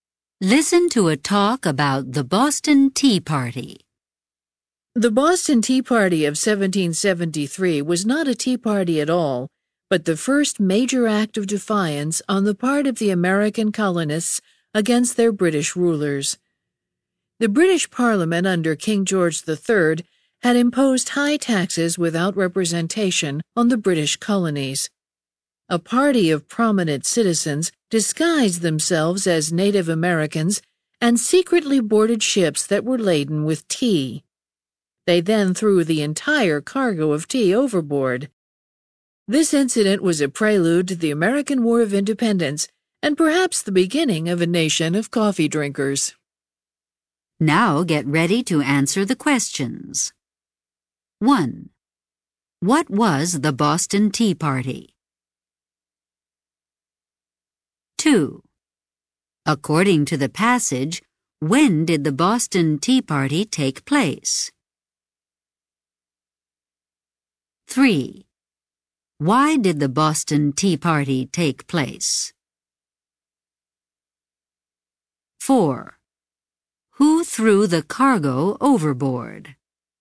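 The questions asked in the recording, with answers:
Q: What was the Boston Tea Party?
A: The first major act of defiance by American colonists against British rule

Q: According to the passage, when did the Boston Tea Party take place?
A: 1773

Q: Why did the Boston Tea Party take place?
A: Britain imposed high taxes without representation on the colonies

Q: Who threw the cargo overboard?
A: Prominent citizens disguised as Native Americans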